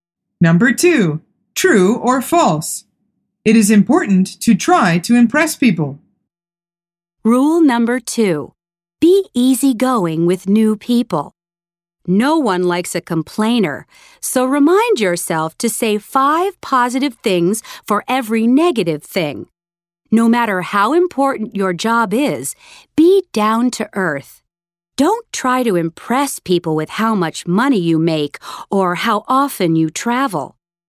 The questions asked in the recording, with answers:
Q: It is important to try to impress people.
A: The answer is false.